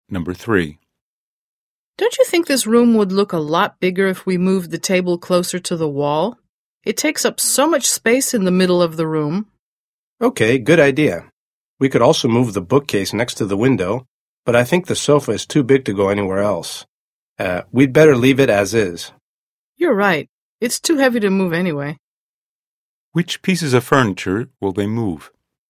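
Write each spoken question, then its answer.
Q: Which pieces of furniture will they move?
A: The table and the bookcase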